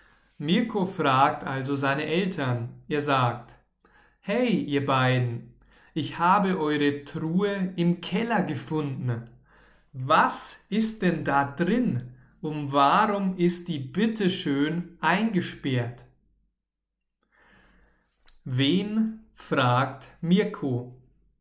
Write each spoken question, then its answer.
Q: Wen fragt Mirko?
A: Seine Eltern. Mirko fragt seine Eltern.